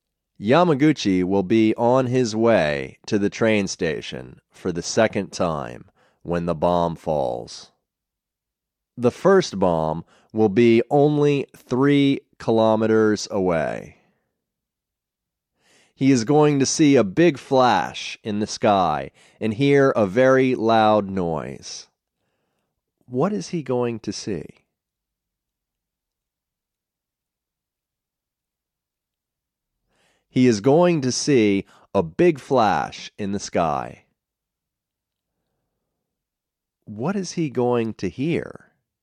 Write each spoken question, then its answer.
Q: What is he going to hear?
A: He is going to hear a very loud noise.